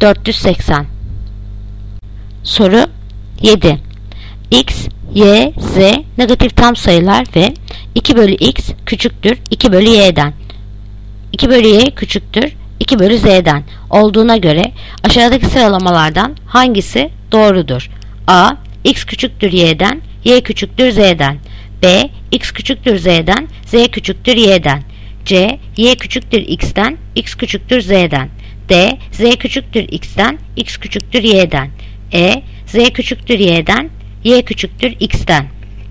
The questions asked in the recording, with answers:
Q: 2/Y küçüktür 2/Z'den olduğuna göre aşağıdaki sıralamalardan hangisi doğrudur?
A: Yanıt Edirne. Z küçüktür Y'den, Y küçüktür X'den.